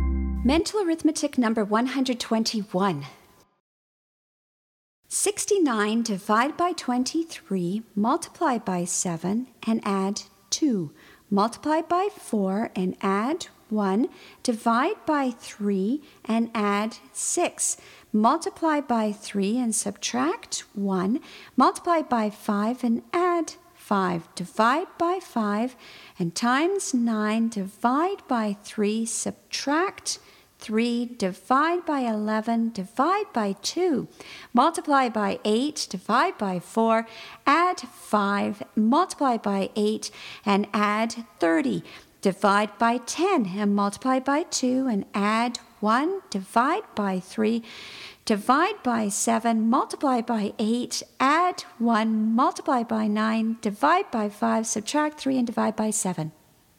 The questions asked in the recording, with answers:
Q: 69 divided by 23, multiply by 7 and add 2. Multiply by 4 and add 1. Divide by 3 and add 6. Multiply by 3 and subtract 1. Multiply by 5 and add 5. Divide by 5 and times 9. Divide by 3, subtract 3, divide by 11, divide by 2, multiply by 8, divide by 4, add 5, multiply by 8, and add 30, divide by 10, and multiply by 2, and add 1, divide by 3, divide by 7, multiply by 8, add 1, multiply by 9, divide by 5, subtract 3, and divide by 7.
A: And the answer is 6.